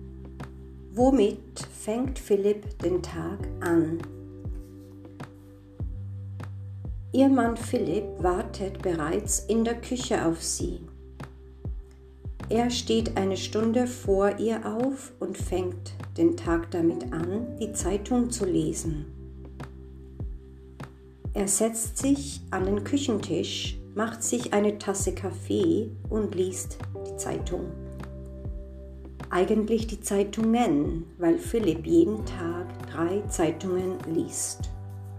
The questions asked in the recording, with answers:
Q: Womit fängt Philipp den Tag an?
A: Er fängt den Tag damit an, die Zeitung zu lesen.